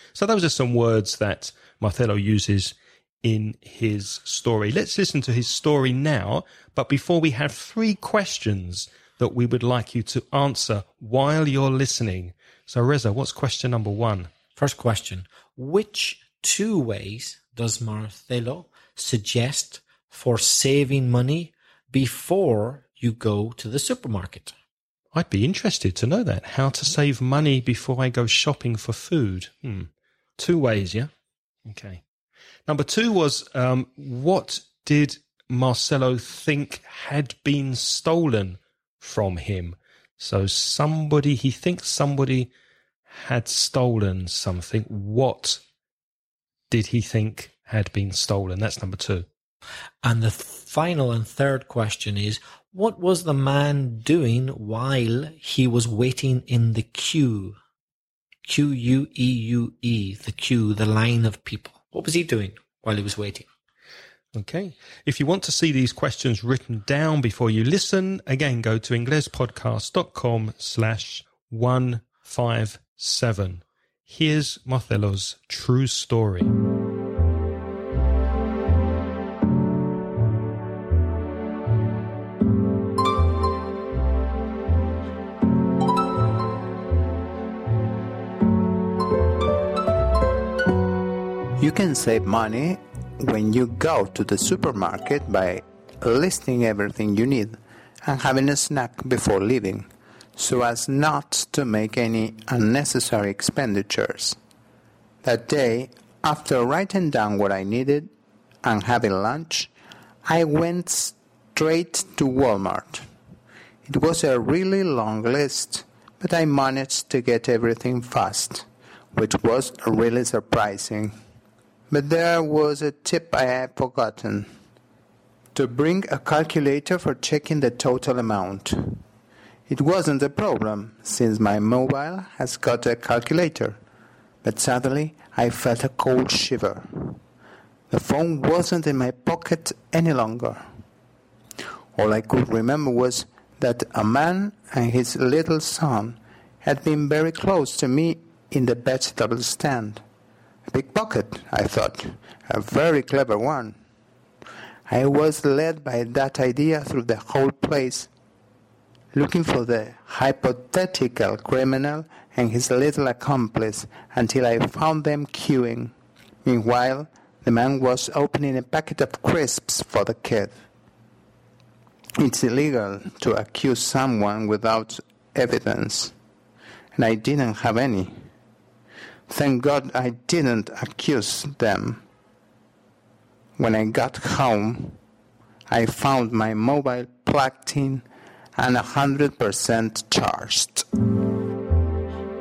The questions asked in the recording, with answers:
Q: which two ways does Marcelo suggest for saving money before you go to the supermarket?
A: One, make a list. And two, eat before you go.

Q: what did Marcelo think had been stolen from him?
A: The answer, his mobile phone.

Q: what was the man doing while he was waiting in the queue?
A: He was opening a packet of crisps.